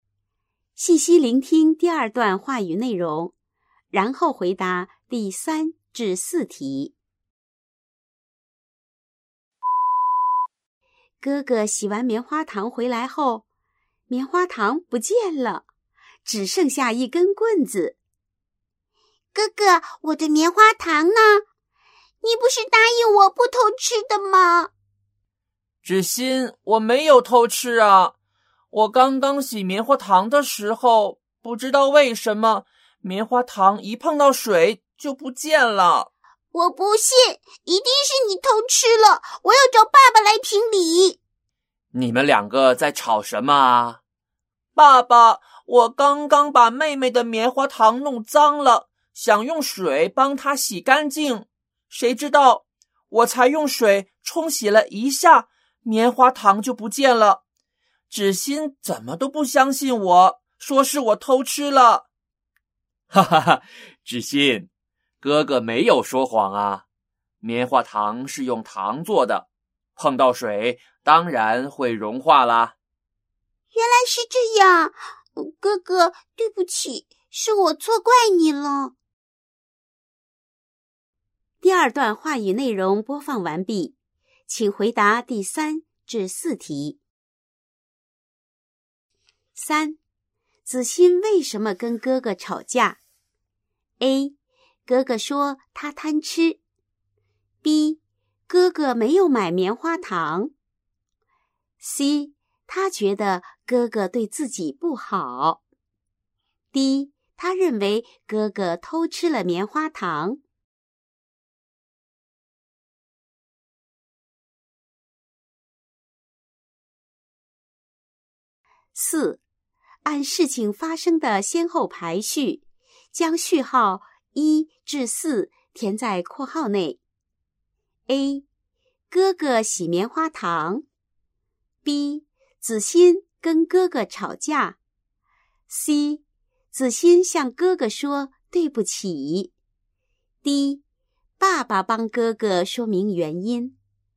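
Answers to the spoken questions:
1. D: 他认为哥哥偷吃了棉花糖。
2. A 1, B 2, D 3, C 4(A→B→D→C)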